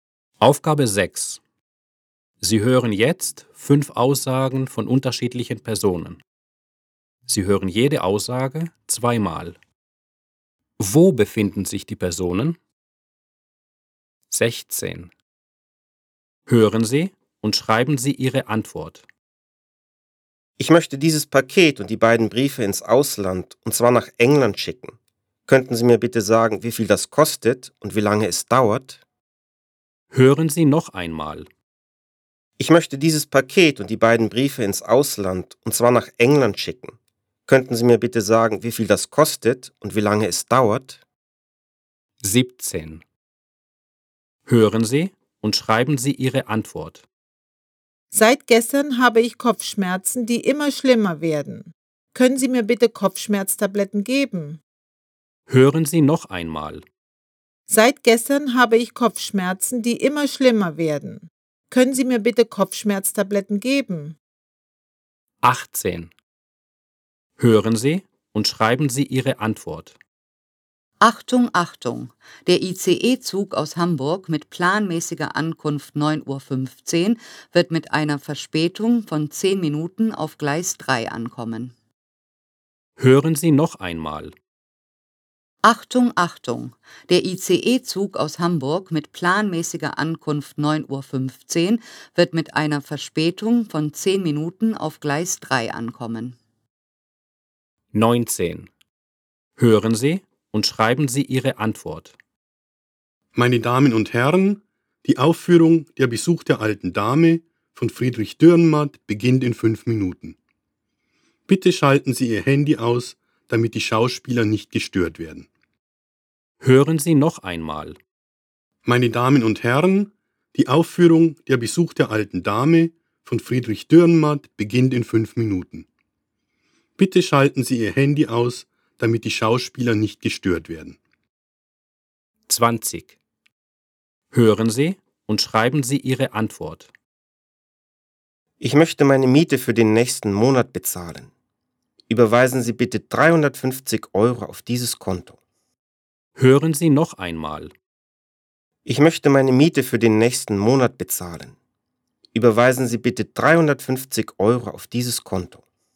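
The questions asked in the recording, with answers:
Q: Wo befinden sich die Personen?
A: Auf der Post

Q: Wo befinden sich die Personen?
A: Am Bahnhof

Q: Wo befinden sich die Personen?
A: Im Theater

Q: Wo befinden sich die Personen?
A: In der Bank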